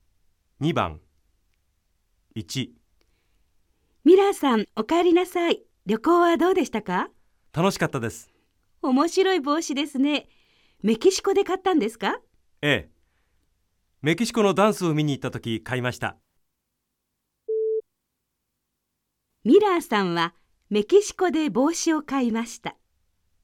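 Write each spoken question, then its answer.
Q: ミラーさんはメキシコで帽子を買いました。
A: ○(正しい)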